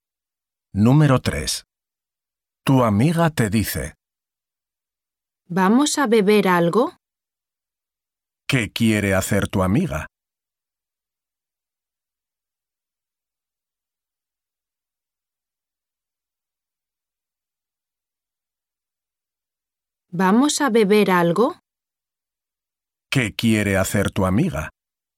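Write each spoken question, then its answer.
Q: ¿Qué quiere hacer tu amiga?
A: beber algo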